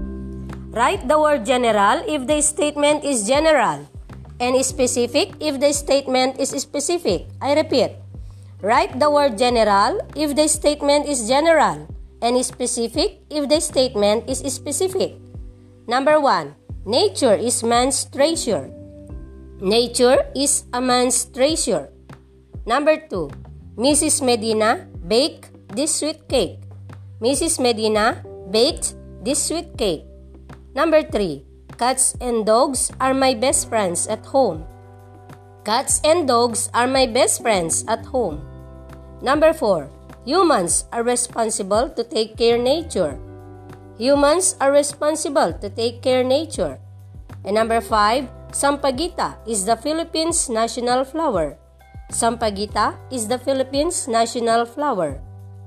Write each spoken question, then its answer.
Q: Number one, nature is man's treasure.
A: number one, general

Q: Number two, Mrs. Medina baked this sweet cake.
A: number two, specific

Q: Number three, cats and dogs are my best friends at home.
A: number three, specific

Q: Number four, humans are responsible to take care nature.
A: number four, general

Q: And number five, Sampaguita is the Philippines' national flower.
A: number five, specific